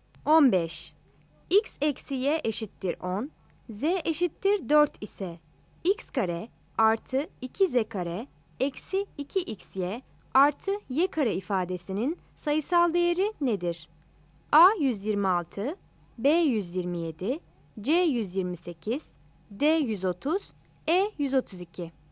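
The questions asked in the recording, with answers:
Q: X eksi Y eşittir 10, Z eşittir 4 ise X kare artı 2Z kare eksi 2XY artı Y kare ifadesinin sayısal değeri nedir?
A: E: 132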